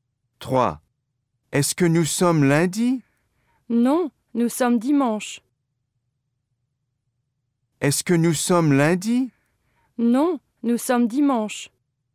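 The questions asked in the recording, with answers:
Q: Est-ce que nous sommes lundi?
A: non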